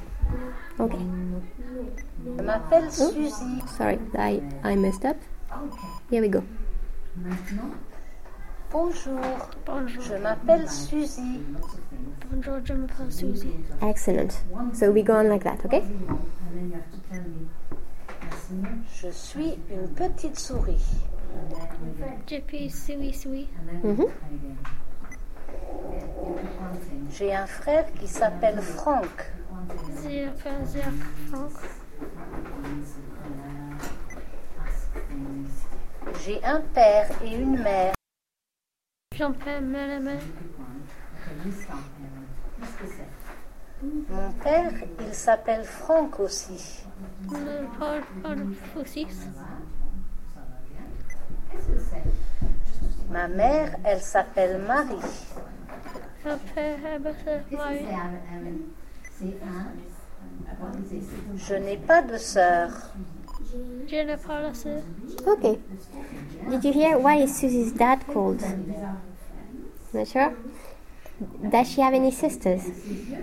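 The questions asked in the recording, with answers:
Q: Did you hear why is Susie's dad called?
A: Franck

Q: Does she have any sisters?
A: No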